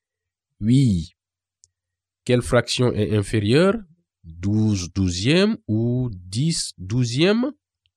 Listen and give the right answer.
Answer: 10 douzièmes est inférieur à 12 douzièmes, car le numérateur 10 est inférieur au numérateur 12.